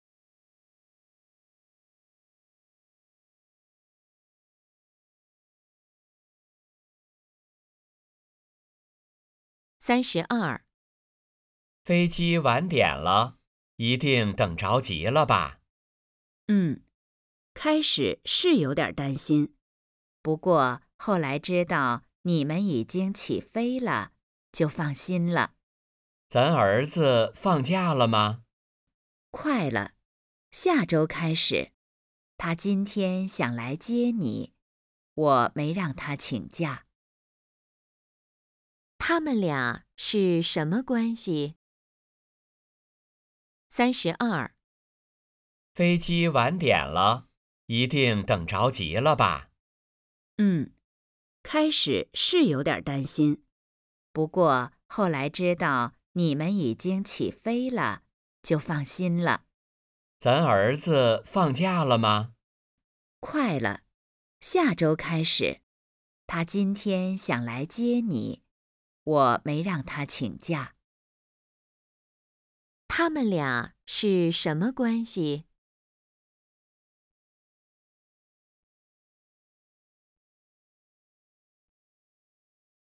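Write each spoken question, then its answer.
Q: 他们俩是什么关系?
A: 夫妻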